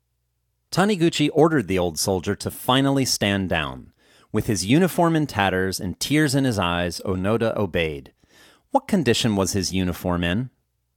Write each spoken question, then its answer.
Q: What condition was his uniform in?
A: His uniform was in tatters.